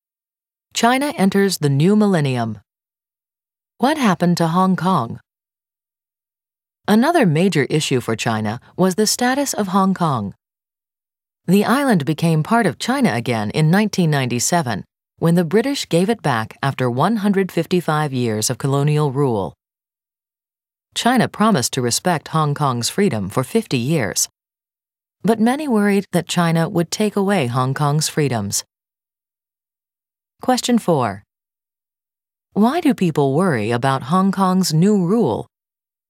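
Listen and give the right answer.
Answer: They worry China will take away Hong Kong's freedoms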